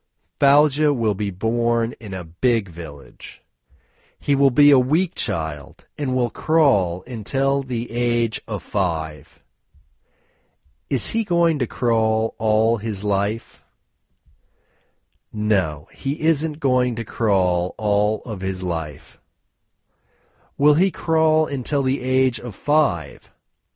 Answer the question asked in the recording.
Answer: Yes, he will crawl until the age of 5.